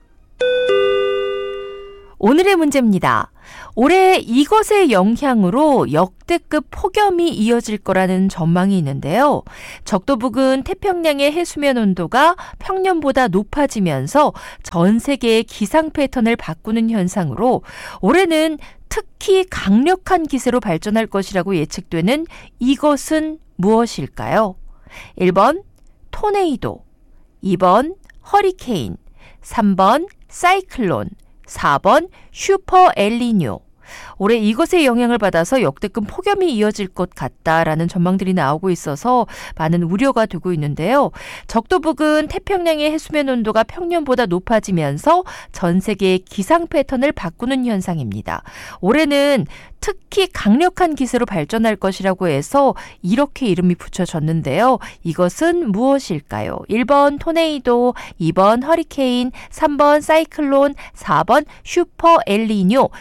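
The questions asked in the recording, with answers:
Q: 적도 부근 태평양의 해수면 온도가 평년보다 높아지면서 전 세계의 기상 패턴을 바꾸는 현상으로 올해는 특히 강력한 기세로 발전할 것이라고 예측되는 이것은 무엇일까요?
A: 4번: 슈퍼 엘니뇨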